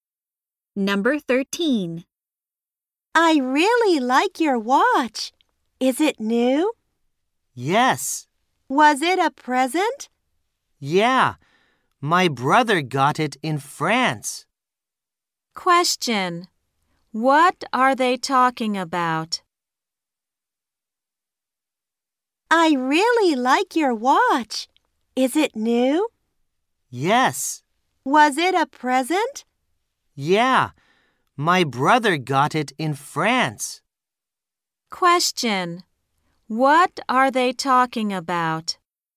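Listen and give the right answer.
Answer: A watch (a present)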